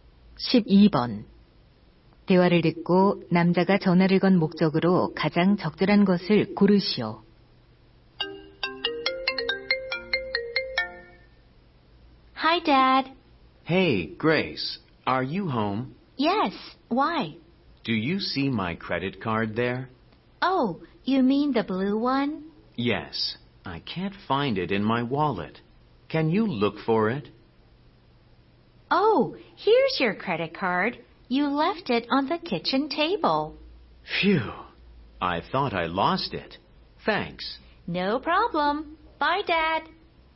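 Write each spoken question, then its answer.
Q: 대화를 듣고 남자가 전화를 건 목적으로 가장 적절한 것을 고르시오.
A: 신용카드를 찾아 달라고 부탁하려고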